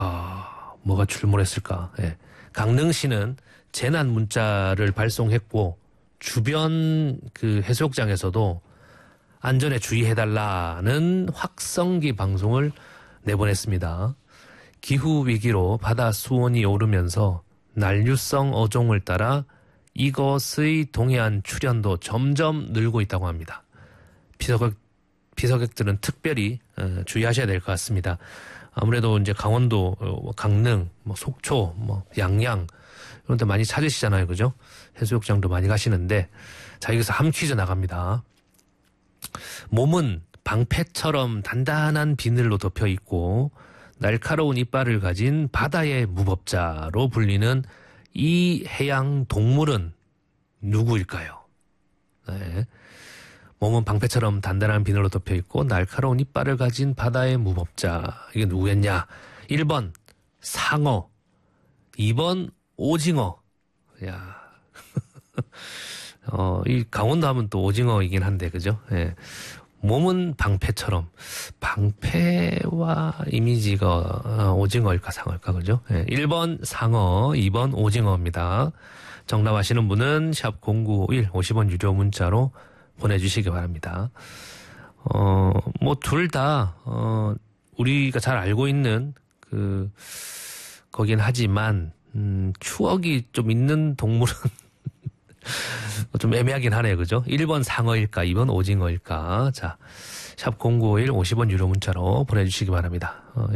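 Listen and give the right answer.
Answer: 1: 상어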